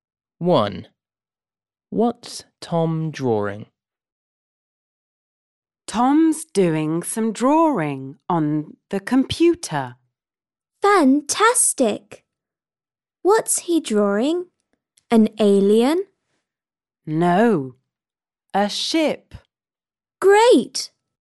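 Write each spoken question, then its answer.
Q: What's Tom drawing?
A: a ship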